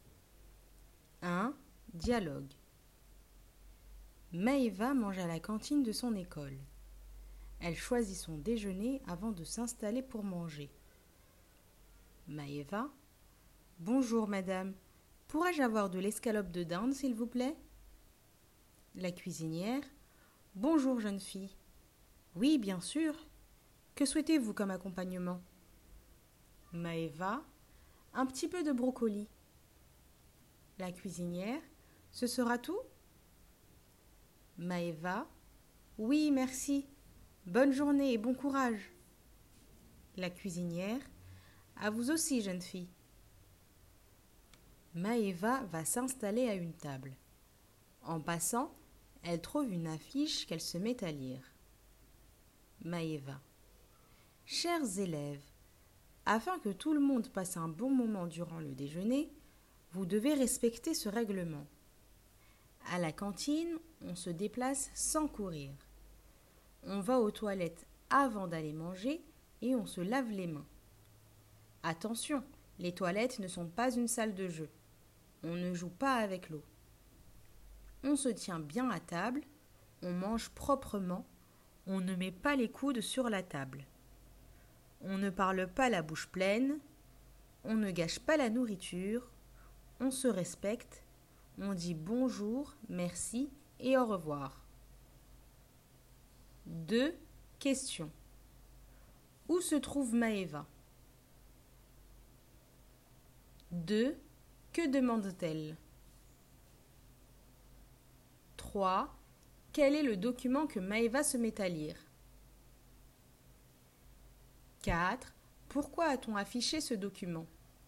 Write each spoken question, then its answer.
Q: Où se trouve Maëva ?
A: Elle se trouve à la cantine de son école.

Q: Que demande-t-elle ?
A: Elle demande de l'escalope de poulet.

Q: Quel est le document que Maëva se met à lire ?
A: C'est une affiche, un règlement.

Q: Pourquoi a-t-on affiché ce document ?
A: C'est un règlement qui permet de mieux vivre ensemble.